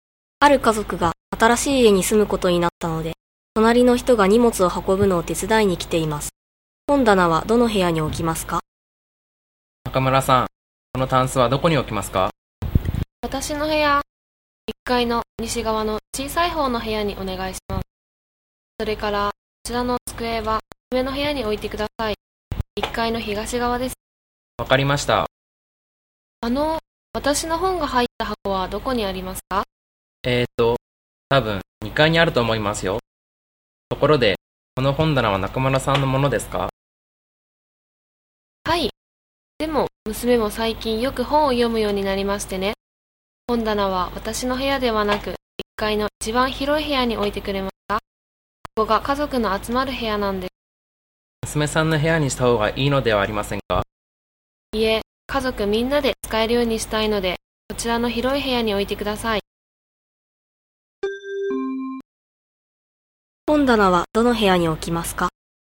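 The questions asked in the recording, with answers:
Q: 本棚はどの部屋に置きますか?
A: 1階の一番広い部屋(家族の集まる部屋)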